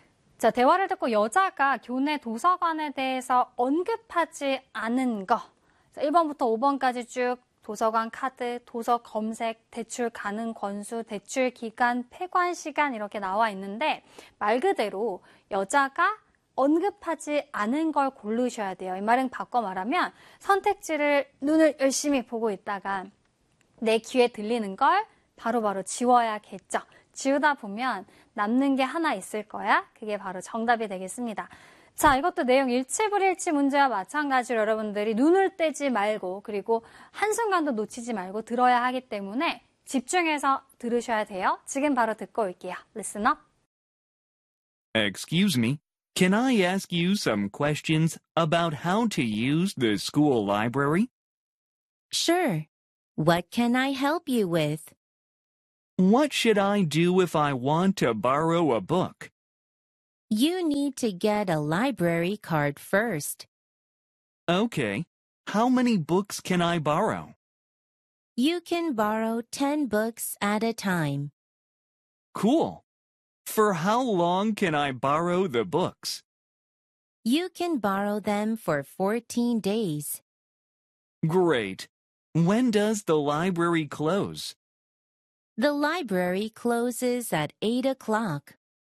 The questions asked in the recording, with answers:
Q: 대화를 듣고 여자가 교내 도서관에 대해서 언급하지 않은 거.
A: 정답은 2번으로 찾아주시면 되겠네요.